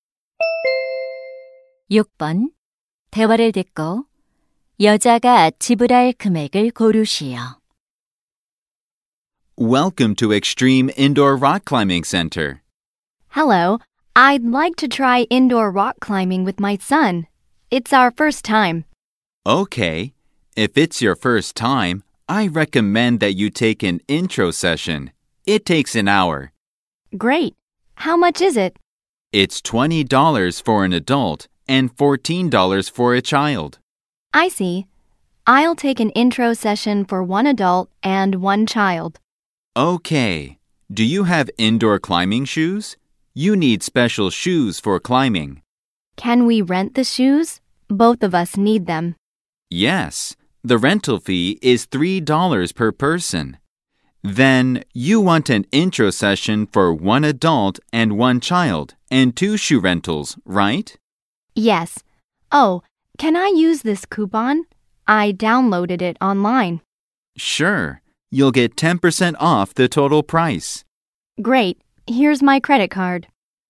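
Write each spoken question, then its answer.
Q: 대화를 듣고 여자가 지불할 금액을 고르시오.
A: $36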